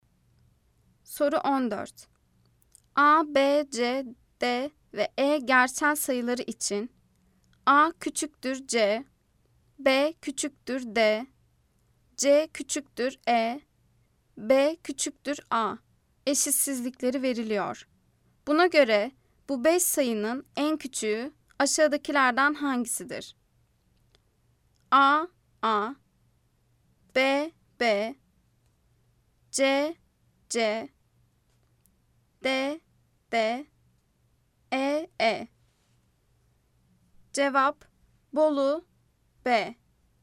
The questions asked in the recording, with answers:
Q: Buna göre bu 5 sayının en küçüğü aşağıdakilerden hangisidir?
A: Cevap Bolu B.